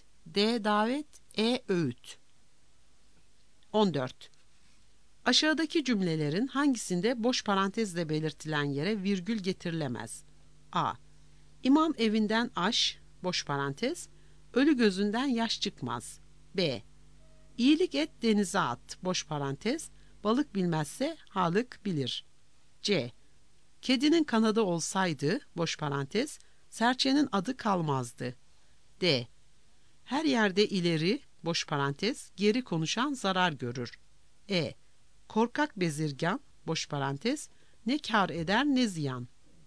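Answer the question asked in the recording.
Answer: D: Her yerde ileri geri konuşan zarar görür.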